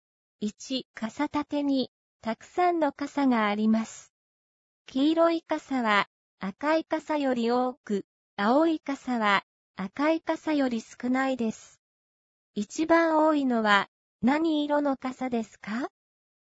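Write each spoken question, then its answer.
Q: 一番多いのは、何色の傘ですか?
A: 黄色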